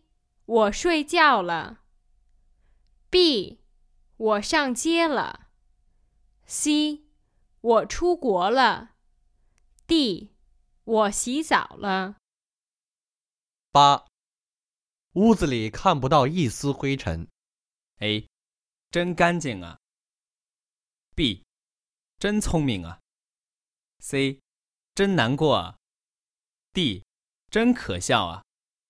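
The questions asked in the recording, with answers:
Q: 屋子里看不到一丝灰尘。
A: A: 真干净啊。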